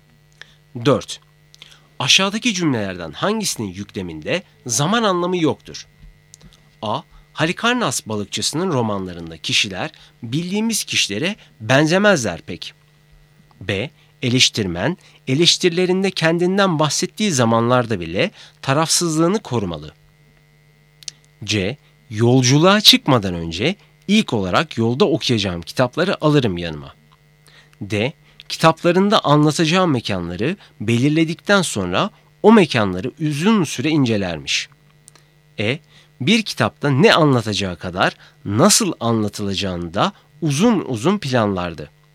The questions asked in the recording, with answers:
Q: Aşağıdaki cümlelerden hangisinin yükleminde zaman anlamı yoktur?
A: Doğru cevap B.